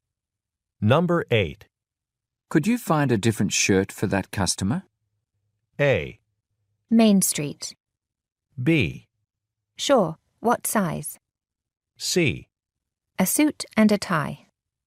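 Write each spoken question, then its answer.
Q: Could you find a different shirt for that customer?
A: B: Sure, what size?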